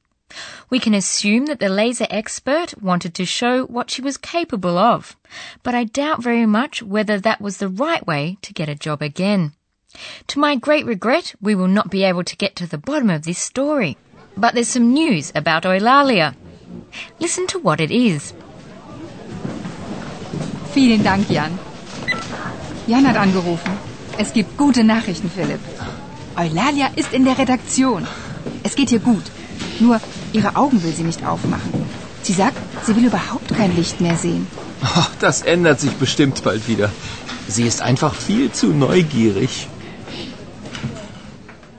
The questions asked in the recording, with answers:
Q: Listen to what it is.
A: So, Eulalia doesn't want to open her eyes anymore, so she's not blinded by the light.